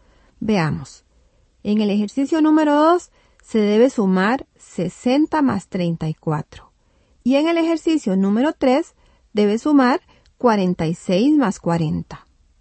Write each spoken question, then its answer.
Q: En el ejercicio número 2 se debe sumar 60 más 34.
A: El total del número 2 es 94.

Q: Y en el ejercicio número 3 debe sumar 46 más 40.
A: Y el total en la número 3 tuvo que darle 86.